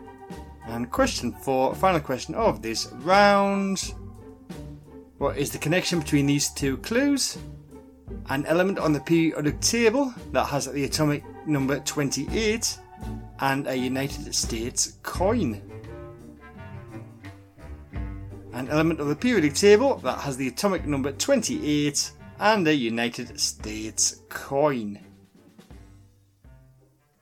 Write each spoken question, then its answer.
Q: What is the connection between these two clues? An element on the periodic table that has the atomic number 28 and a United States coin.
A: is nickel